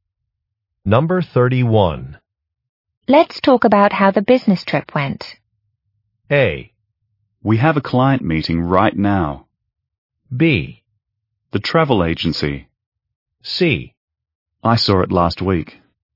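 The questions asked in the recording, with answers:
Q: Let's talk about how the business trip went.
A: A: We have a client meeting right now.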